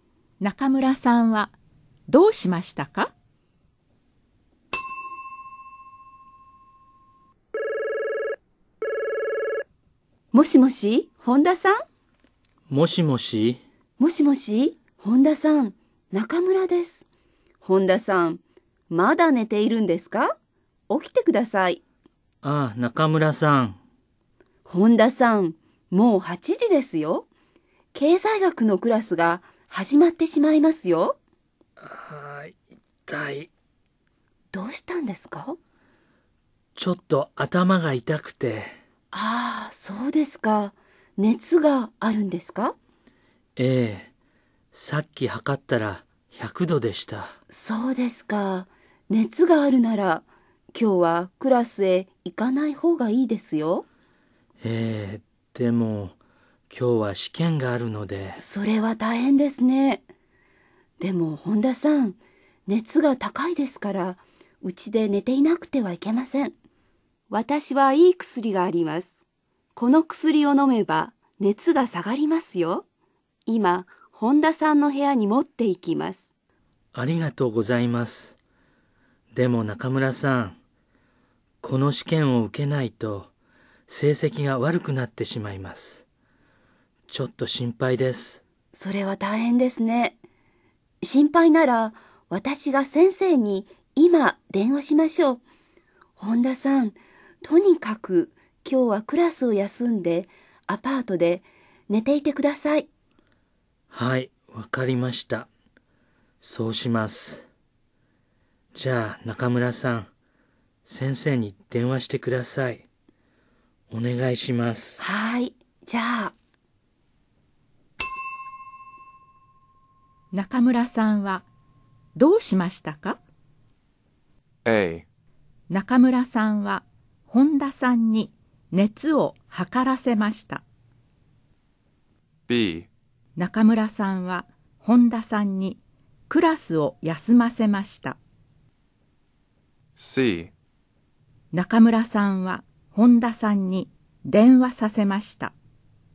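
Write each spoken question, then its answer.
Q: 中村さんはどうしましたか?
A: B: 中村さんは本田さんにクラスを休ませました。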